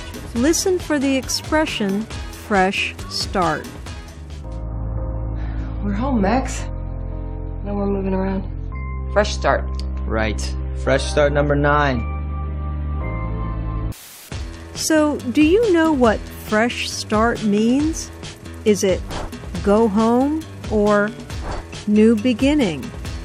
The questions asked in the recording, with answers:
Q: So, do you know what fresh start means? Is it go home or new beginning?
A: Fresh start means a new beginning.